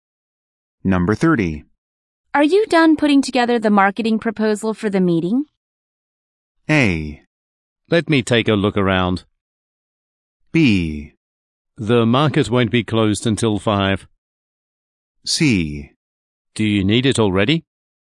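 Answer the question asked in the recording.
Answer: C: Do you need it already?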